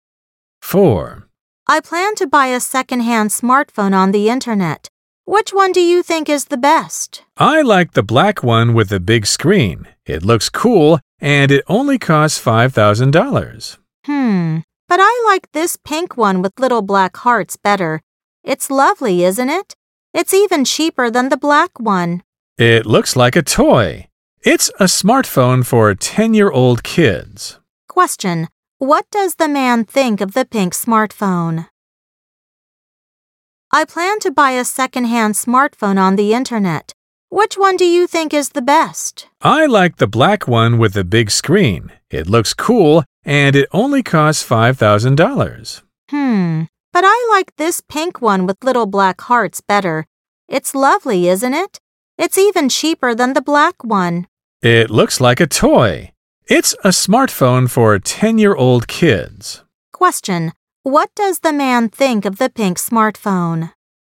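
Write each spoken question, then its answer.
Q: What does the man think of the pink smartphone?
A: It looks like a toy, a phone for 10-year-old kids.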